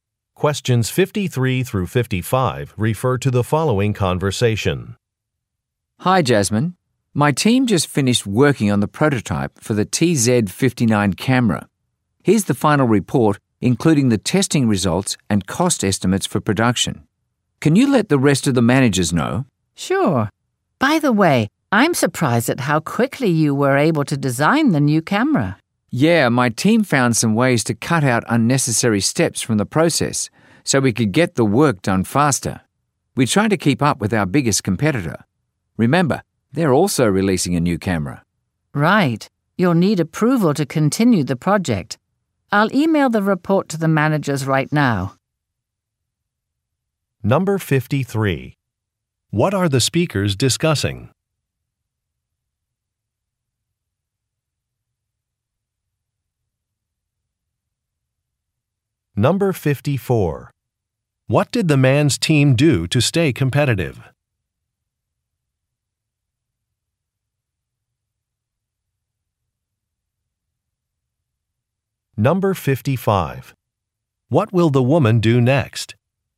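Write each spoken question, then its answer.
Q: What are the speakers discussing?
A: A camera prototype

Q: What did the man's team do to stay competitive?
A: Cut unnecessary steps from the process

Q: What will the woman do next?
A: Email the report to the managers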